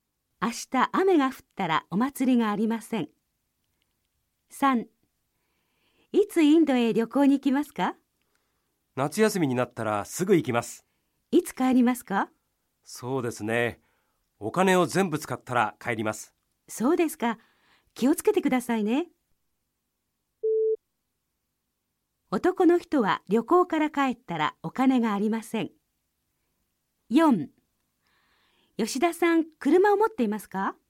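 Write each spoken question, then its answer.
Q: 男の人は旅行から帰ったらお金がありません。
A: ○(正しい)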